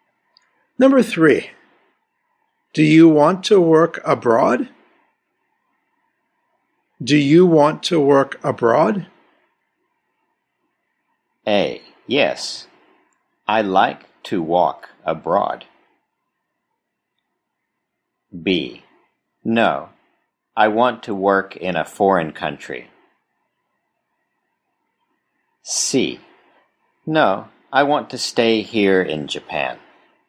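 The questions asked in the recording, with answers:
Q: Do you want to work abroad?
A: C: No. I want to stay here in Japan.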